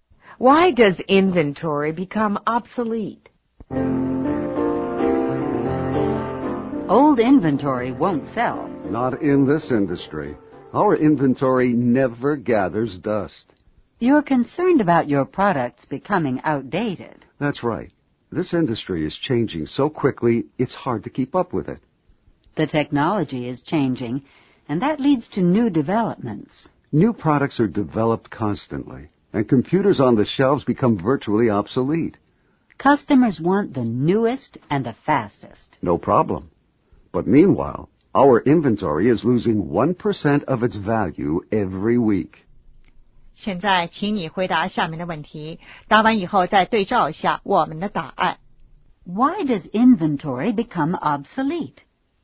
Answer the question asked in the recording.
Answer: New products are developed constantly.